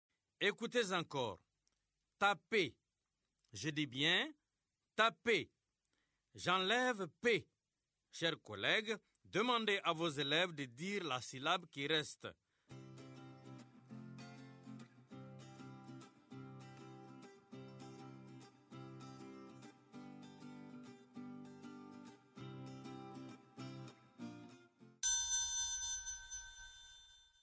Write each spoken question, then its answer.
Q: Taper. Je dis bien taper. J'enlève P. Chers collègues, demandez à vos élèves de dire la syllabe qui reste.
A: Il reste ta.